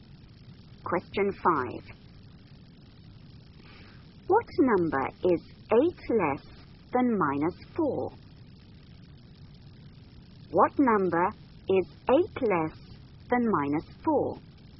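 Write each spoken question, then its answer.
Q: What number is 8 less than minus 4?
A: -12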